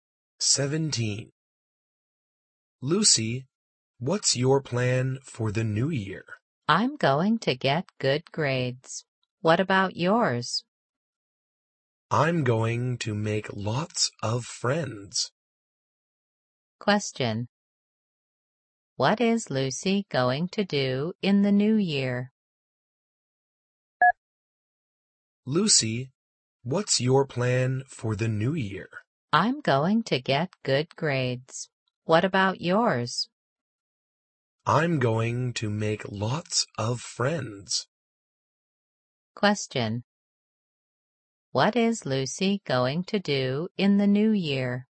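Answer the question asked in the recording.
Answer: Get good grades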